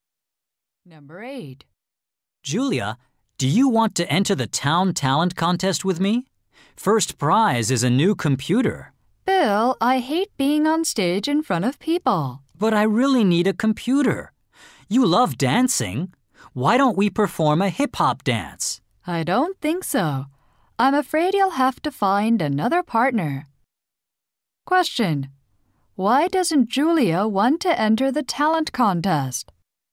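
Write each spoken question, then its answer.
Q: Why doesn't Julia want to enter the talent contest?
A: She hates being on stage in front of people.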